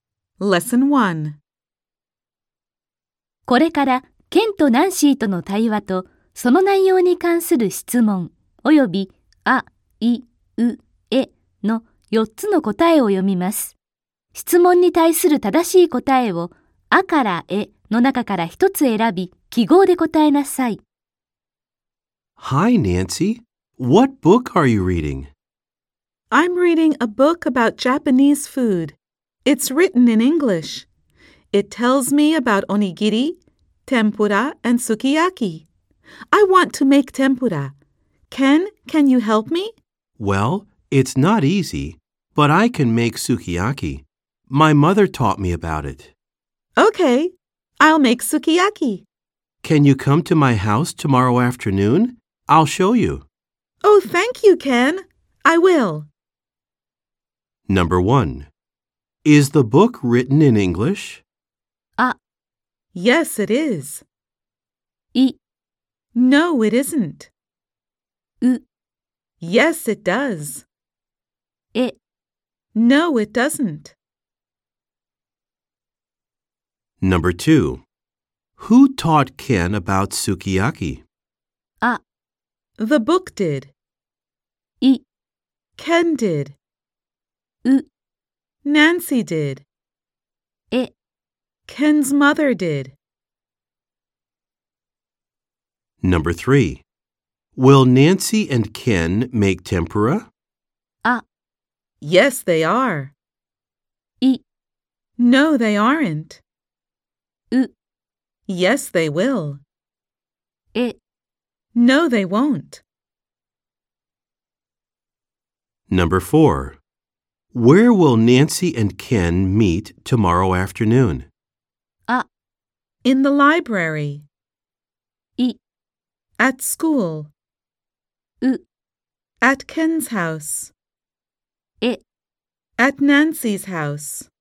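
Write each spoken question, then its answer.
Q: Is the book written in English?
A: あ: Yes, it is.

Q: Who taught Ken about sukiyaki?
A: え: Ken's mother did.

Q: Will Nancy and Ken make tempura?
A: え: No, they won't.

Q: Where will Nancy and Ken meet tomorrow afternoon?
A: う: At Ken's house.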